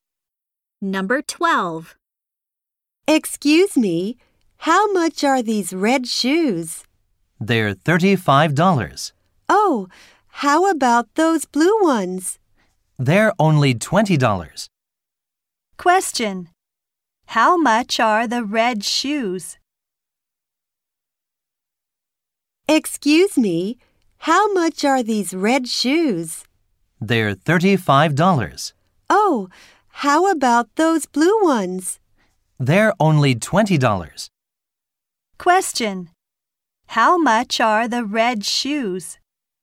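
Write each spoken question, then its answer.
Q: How much are the red shoes?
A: $35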